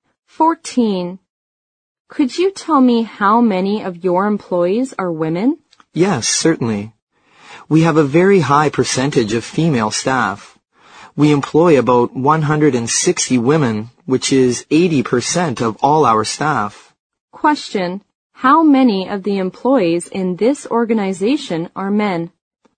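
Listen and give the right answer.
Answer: 40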